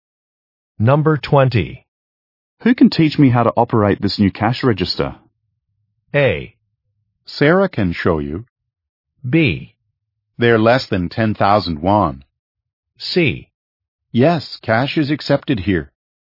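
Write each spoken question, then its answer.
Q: Who can teach me how to operate this new cash register?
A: A: Sarah can show you.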